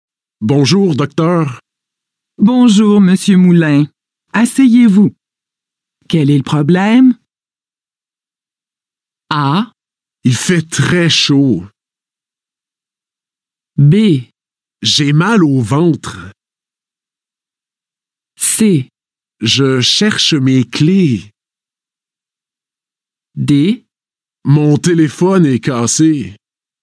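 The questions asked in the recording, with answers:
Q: Quel est le problème?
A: B: J'ai mal au ventre.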